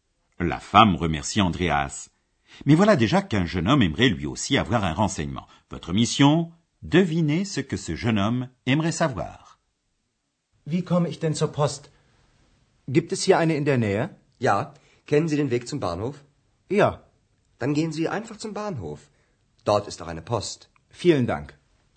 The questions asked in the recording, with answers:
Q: Devinez ce que ce jeune homme aimerait savoir.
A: Le jeune homme aimerait savoir s'il y a un bureau de poste à proximité de l'hôtel.